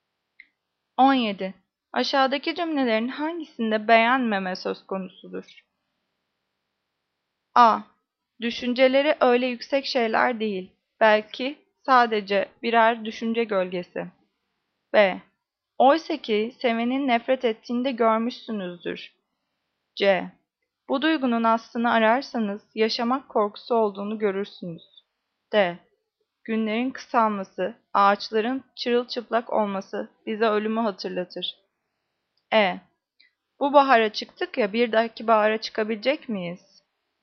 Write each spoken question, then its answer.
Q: Aşağıdaki cümlelerin hangisinde beğenmeme söz konusudur?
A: Cevap A. Düşünceleri, öyle yüksek şeyler değil, belki sadece birer düşünce gölgesi.